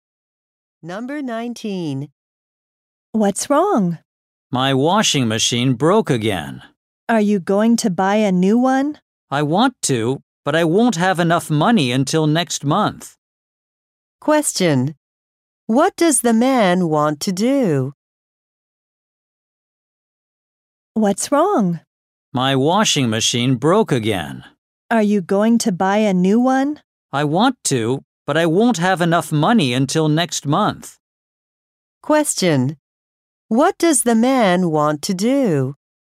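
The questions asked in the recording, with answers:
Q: What does the man want to do?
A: Buy a new washing machine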